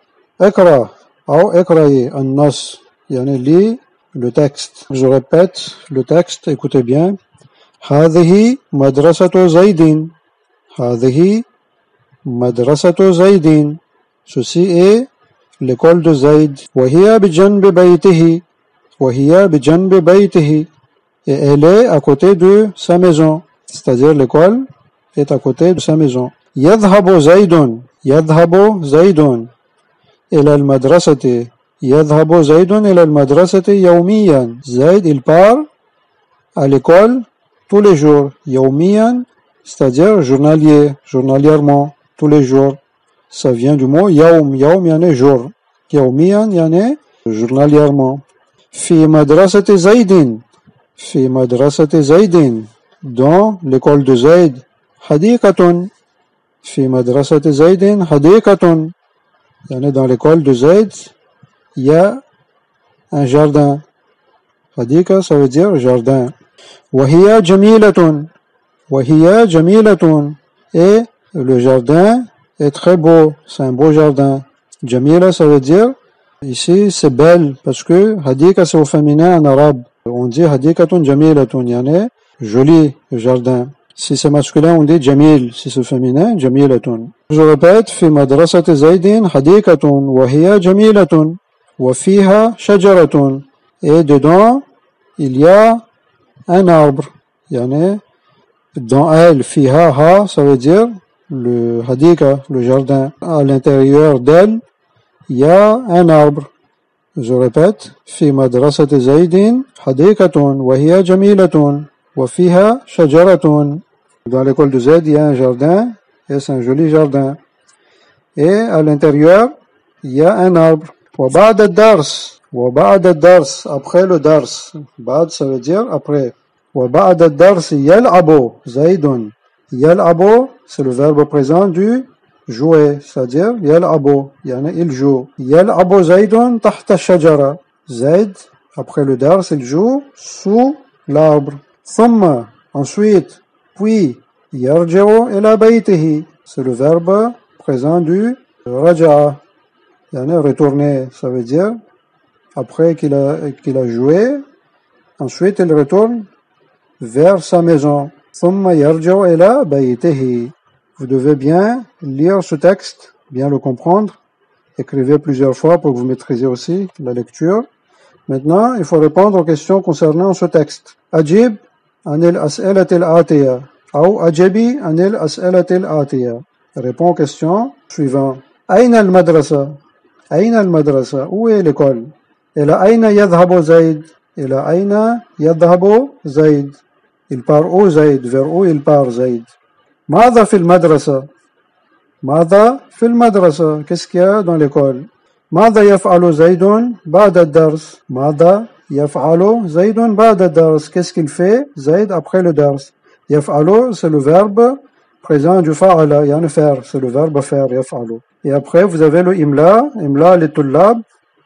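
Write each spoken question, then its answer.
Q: أين المدرسة؟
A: هي بجنب بيت زيد

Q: إلى أين يذهب زيد؟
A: يذهب إلى المدرسة يوميا

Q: ماذا في المدرسة؟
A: في المدرسة حديقة جميلة وفيها شجرة

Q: ماذا يفعل زيد بعد الدرس؟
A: يلعب تحت الشجرة ثم يرجع إلى بيته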